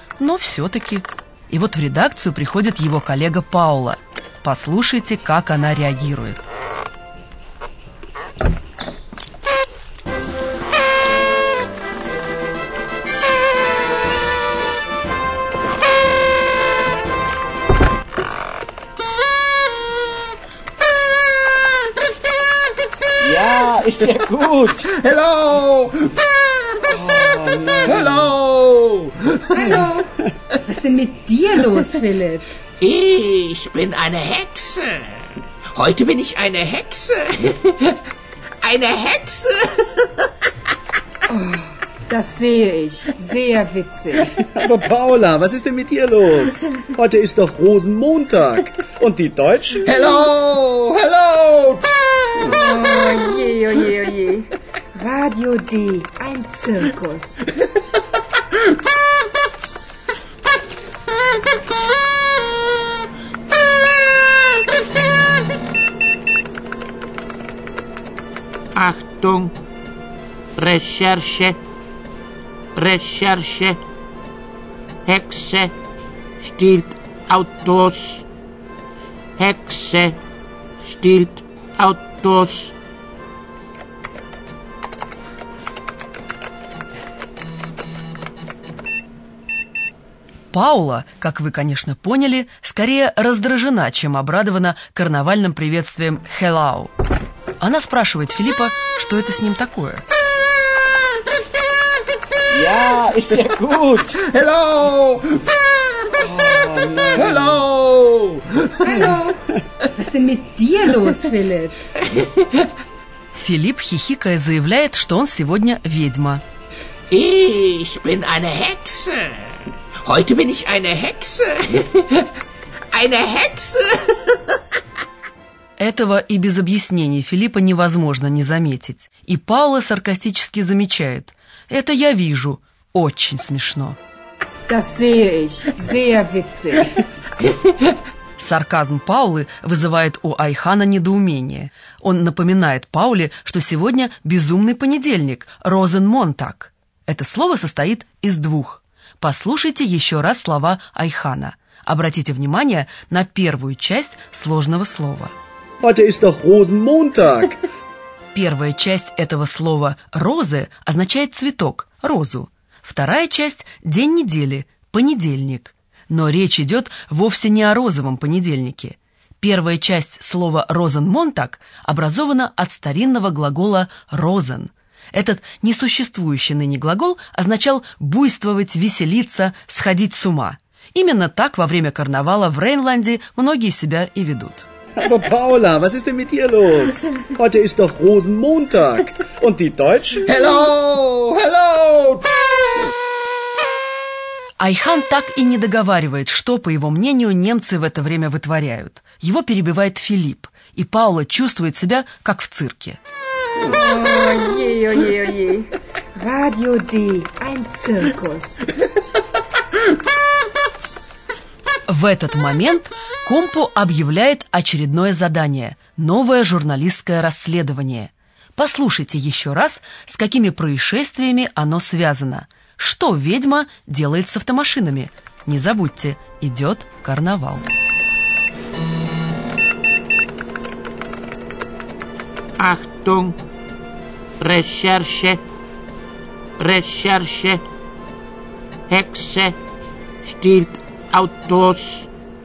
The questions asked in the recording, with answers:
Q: Что ведьма делает с автомашинами?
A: Некто, переодетый ведьмой, маскировка подходящая для карнавала, крадет автомашины.